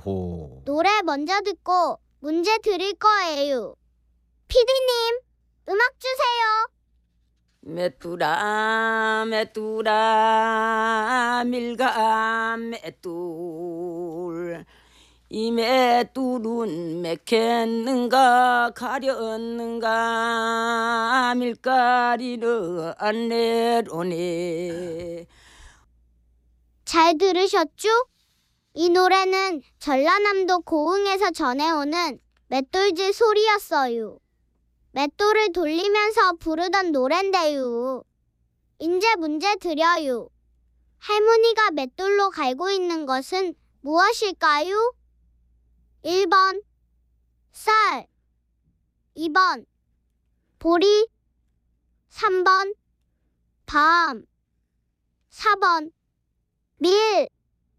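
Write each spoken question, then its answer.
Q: 할머니가 맷돌로 갈고 있는 것은 무엇일까요? 1번 쌀, 2번 보리, 3번 밤, 4번 밀.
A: 4번: 밀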